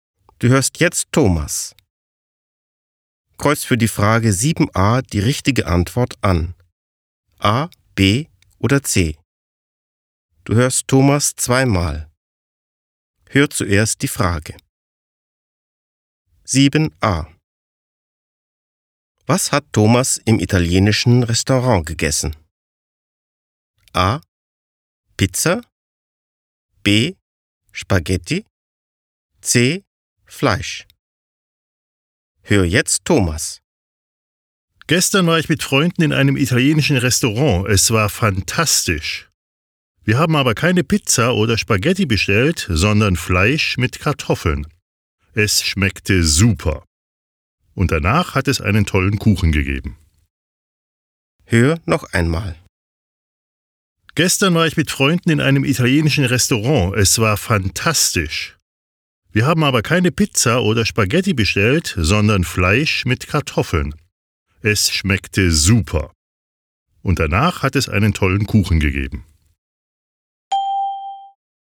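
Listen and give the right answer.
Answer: C: Fleisch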